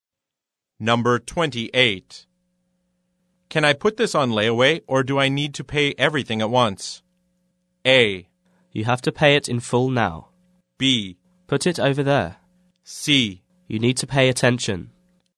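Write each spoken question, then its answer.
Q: Can I put this on layaway or do I need to pay everything at once?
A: A: You have to pay it in full now.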